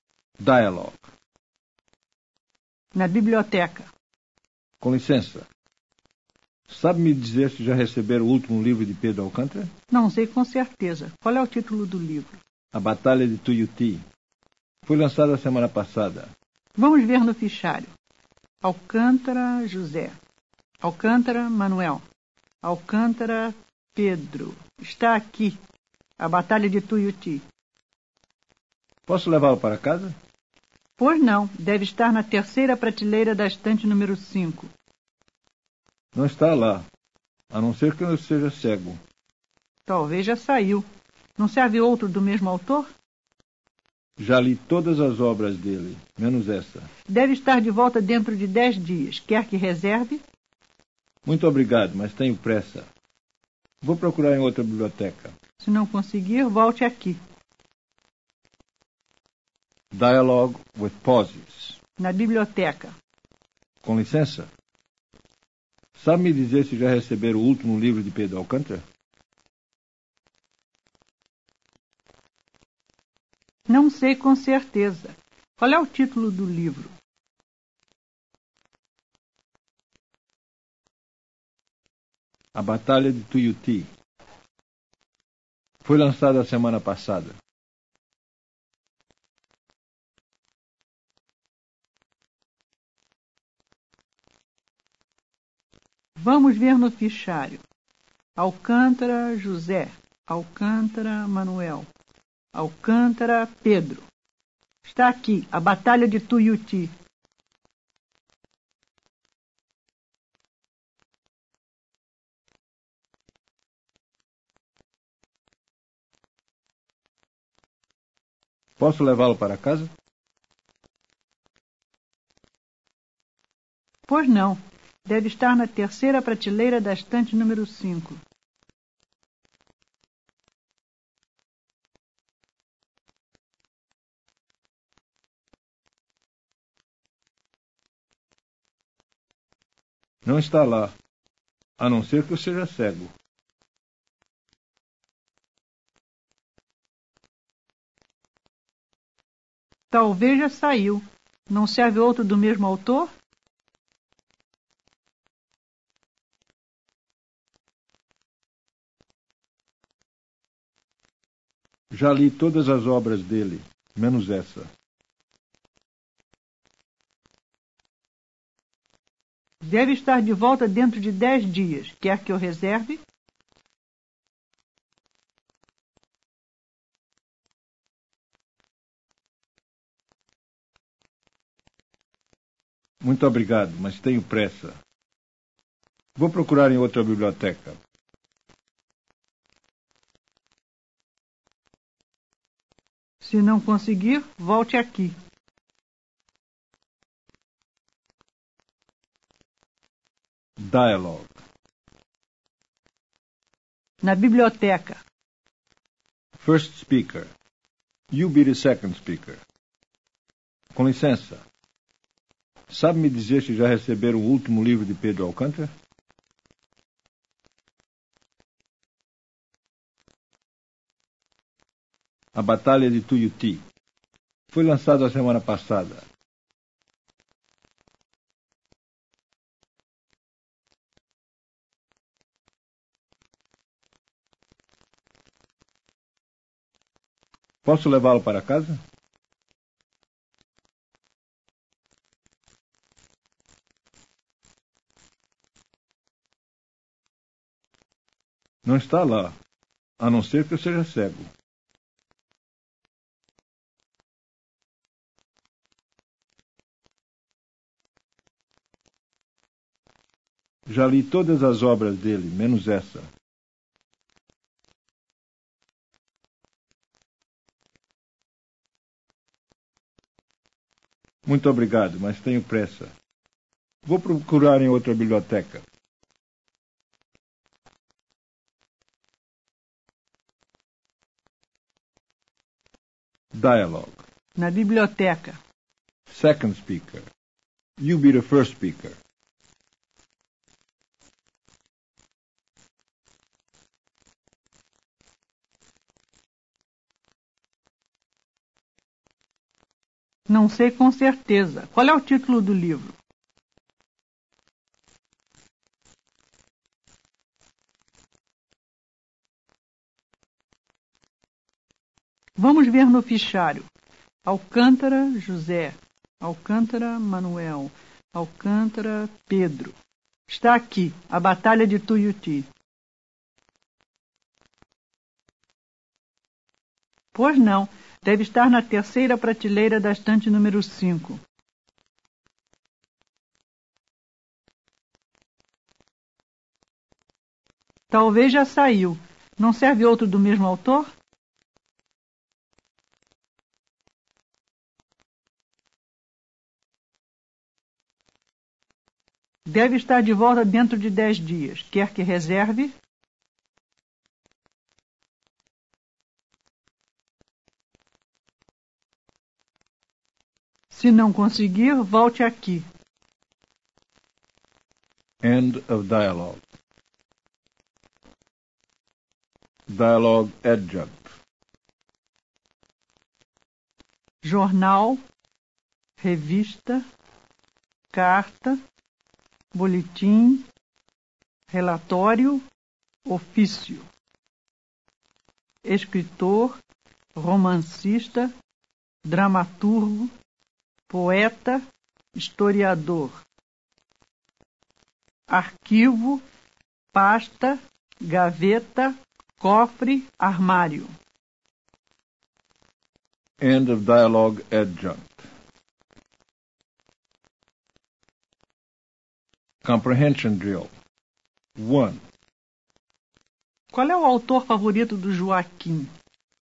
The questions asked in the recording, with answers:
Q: Qual é o autor favorito do Joaquim?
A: Pedro Alcântara.